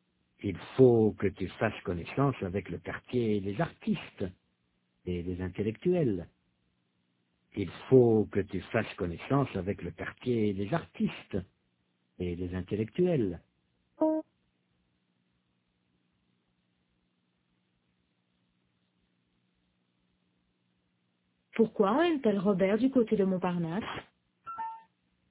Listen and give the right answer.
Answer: Parce qu'il faut qu'il fasse connaissance avec le quartier des artistes et des intellectuels.